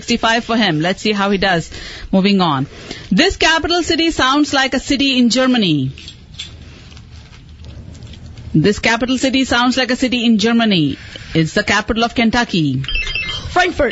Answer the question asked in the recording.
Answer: Frankfurt